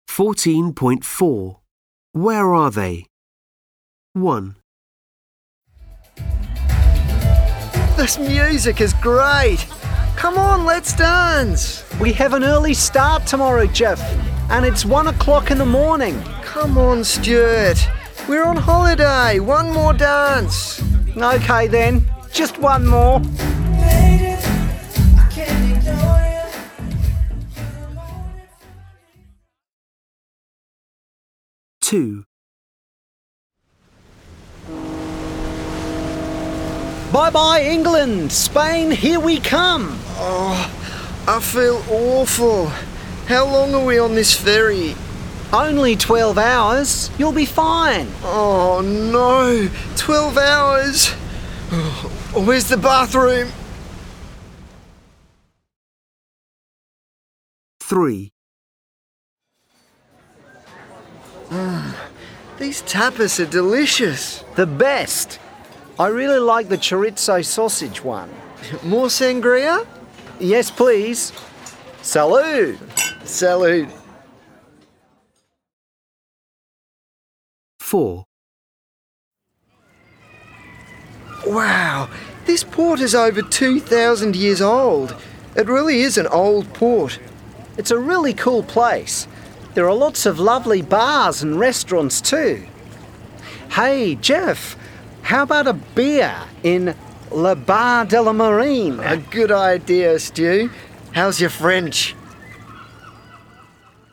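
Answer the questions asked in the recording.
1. At a club or disco, dancing
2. On a ferry from England to Spain
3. At a tapas bar or restaurant in Spain
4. At an old port in France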